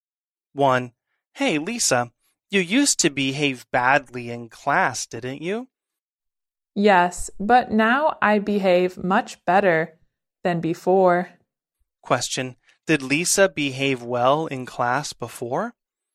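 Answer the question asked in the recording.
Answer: No, she behaved badly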